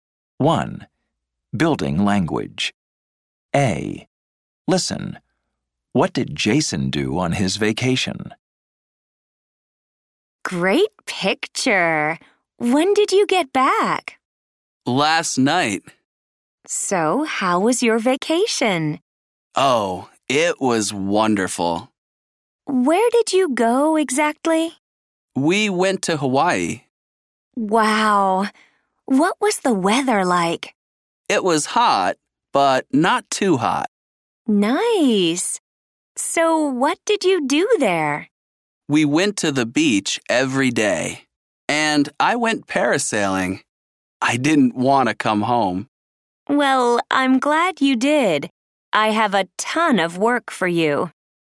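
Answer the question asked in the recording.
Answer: He went to Hawaii, went to the beach every day, and went parasailing.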